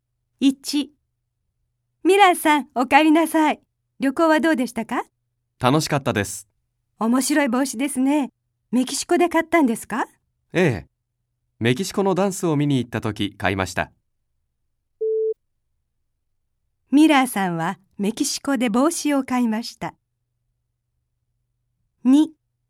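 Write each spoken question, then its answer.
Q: ミラーさんはメキシコで帽子を買いました。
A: 正しい(○)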